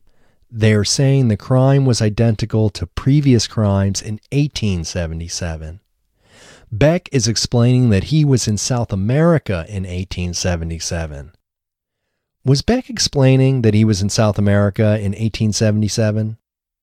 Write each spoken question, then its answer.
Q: Was Beck explaining that he was in South America in 1877?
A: Yes, Beck is explaining that he was in South America in 1877.